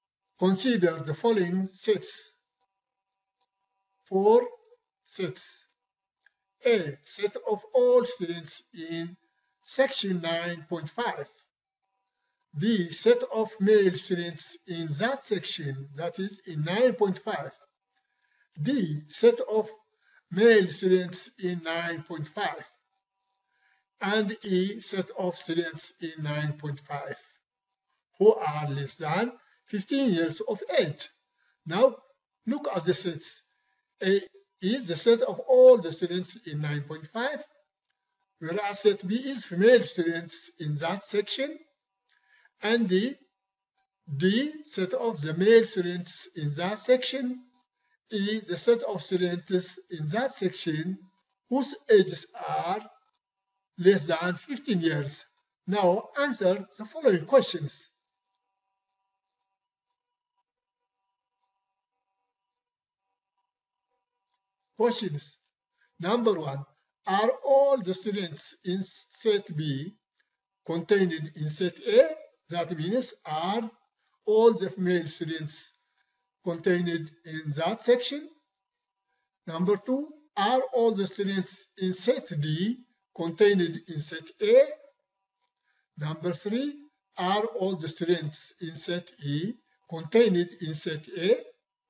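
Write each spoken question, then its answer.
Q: are all the students in set B contained in set A?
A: Yes

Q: are all the students in set D contained in set A?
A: Yes

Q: are all the students in set E contained in set A?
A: Yes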